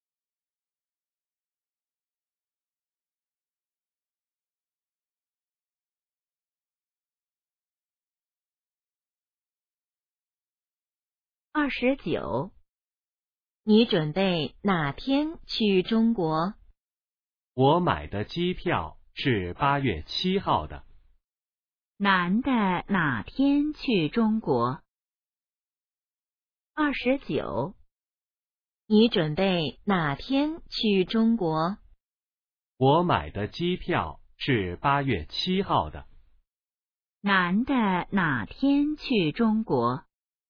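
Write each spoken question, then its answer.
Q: 男的哪天去中国?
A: 8月7号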